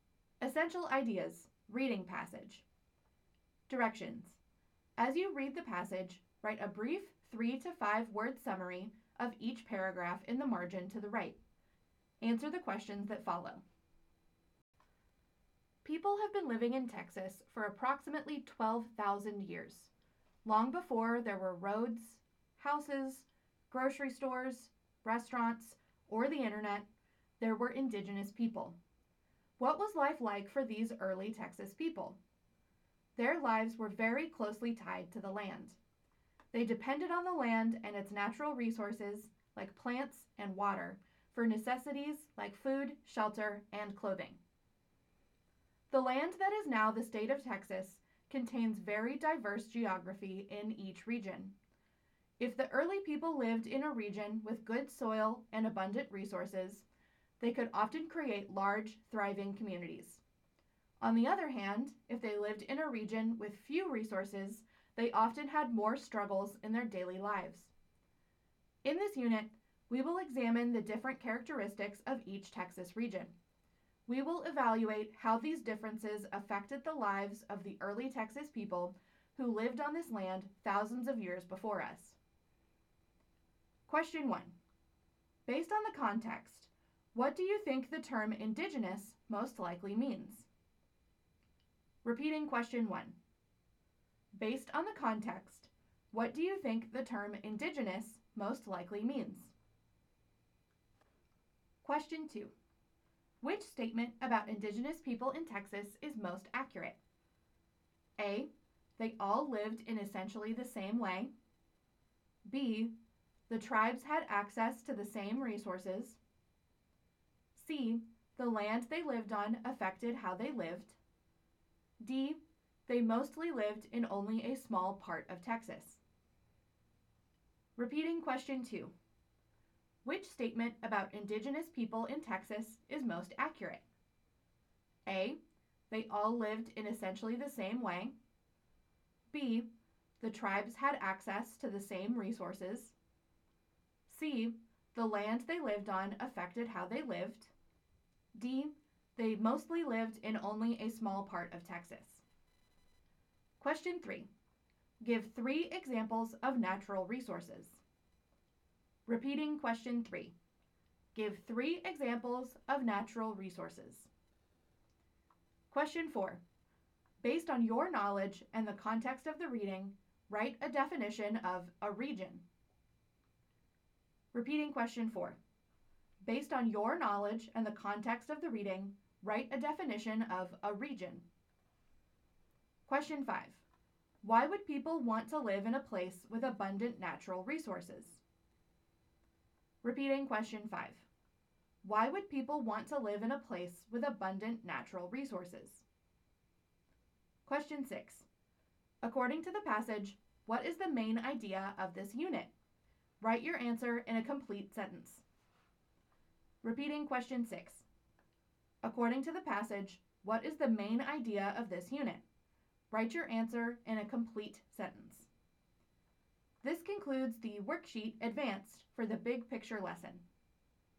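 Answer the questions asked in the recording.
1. The original/native people who lived in a place first
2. C: The land they lived on affected how they lived.
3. Plants, water, soil
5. They could get food, shelter and clothing more easily and build large, thriving communities
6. How the characteristics of each Texas region affected the lives of the early Texas people who lived there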